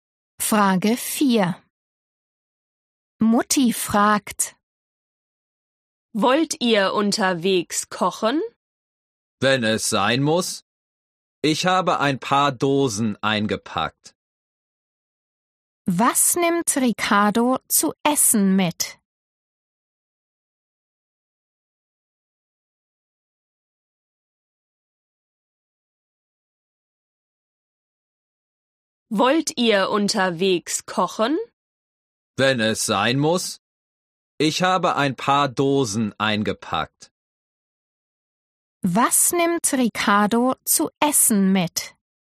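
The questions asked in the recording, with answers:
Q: Was nimmt Ricardo zu essen mit?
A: ein paar Dosen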